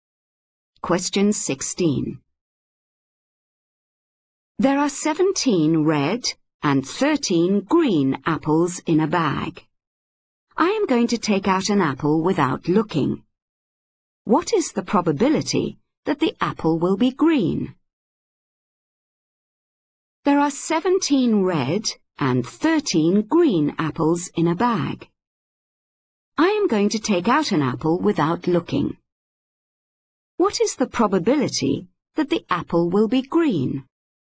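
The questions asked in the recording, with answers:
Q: What is the probability that the apple will be green?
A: 13/30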